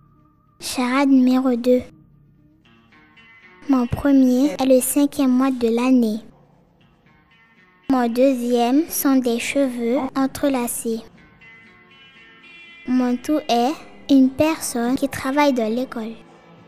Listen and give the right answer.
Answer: maîtresse.